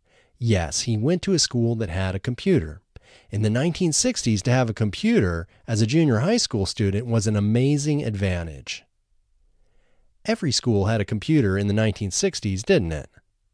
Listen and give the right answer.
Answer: No, not every school had a computer in the 1960s.